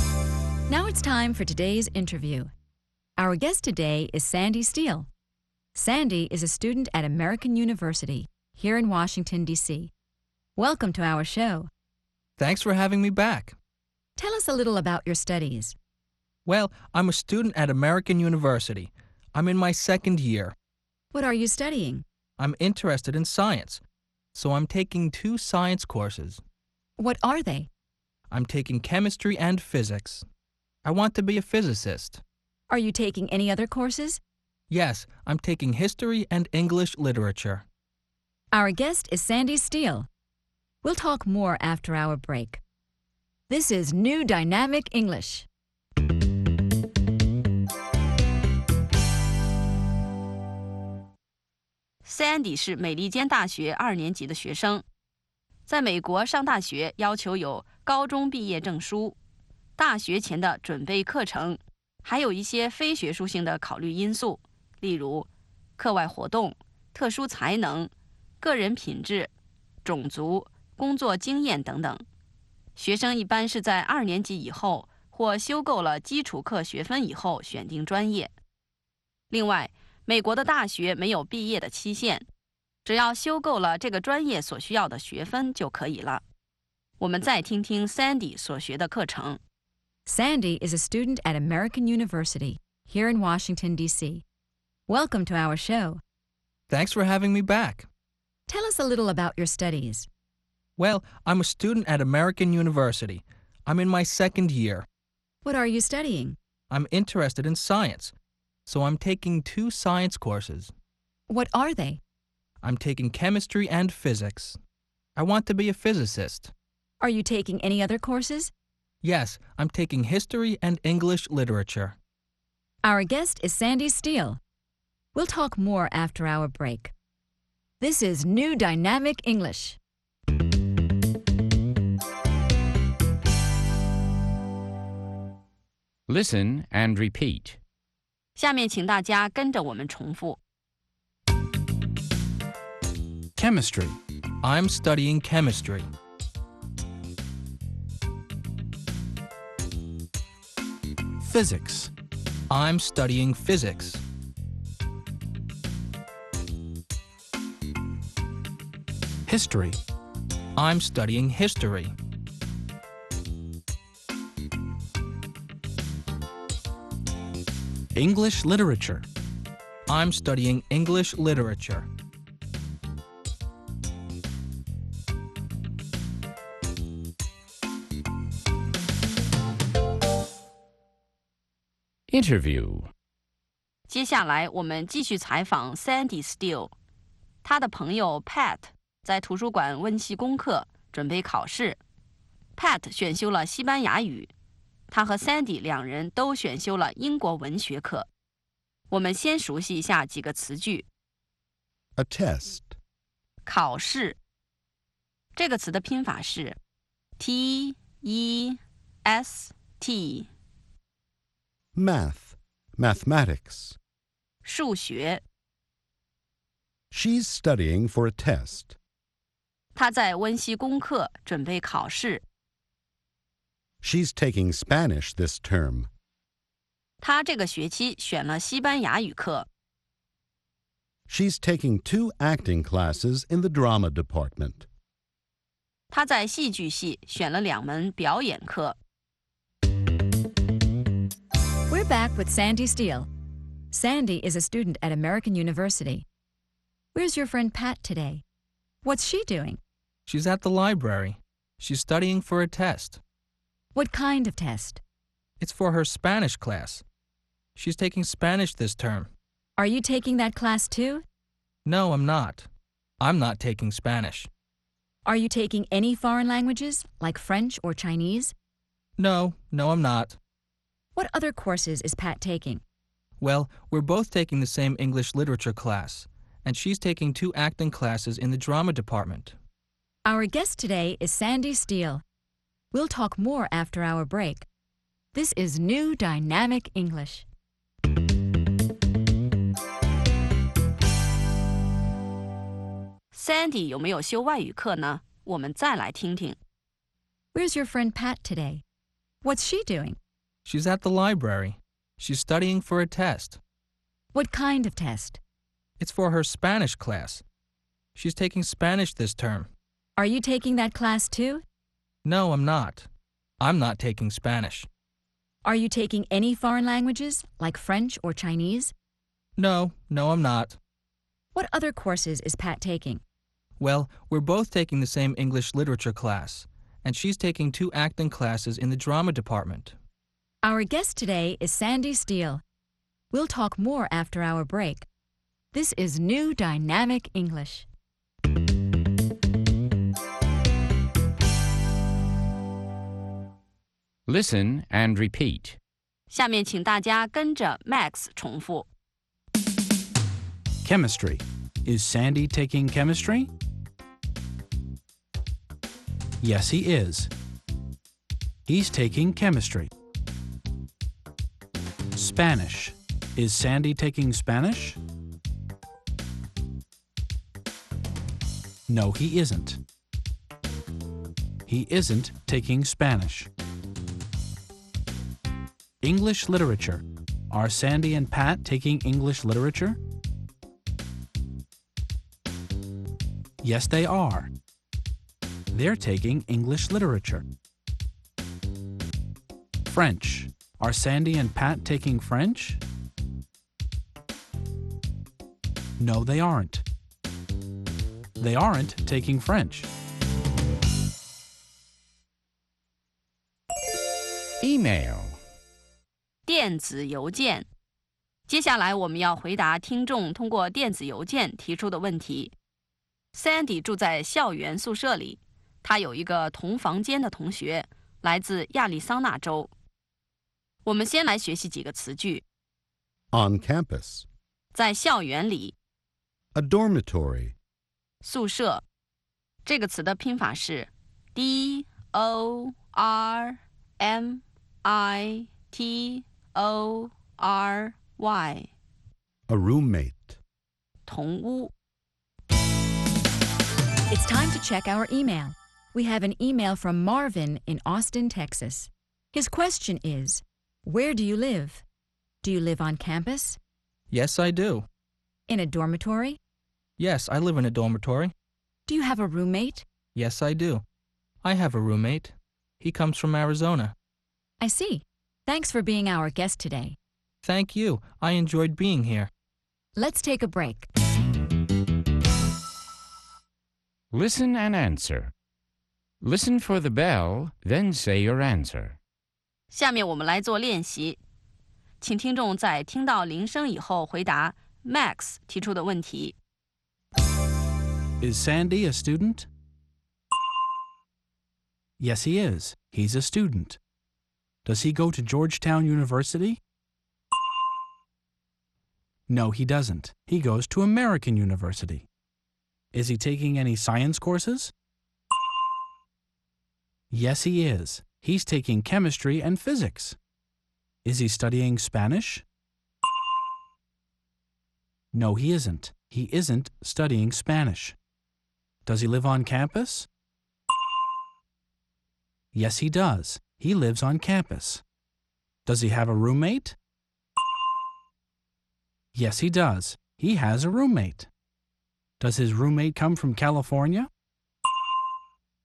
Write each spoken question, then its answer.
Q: Is Sandy a student?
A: Yes, he is. He's a student.

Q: Does he go to Georgetown University?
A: No, he doesn't. He goes to American University.

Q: Is he taking any science courses?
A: Yes, he is. He's taking chemistry and physics.

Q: Is he studying Spanish?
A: No, he isn't. He isn't studying Spanish.

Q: Does he have a roommate?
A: Yes, he does.

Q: Does his roommate come from California?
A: No, he doesn't. Sandy's roommate comes from Arizona.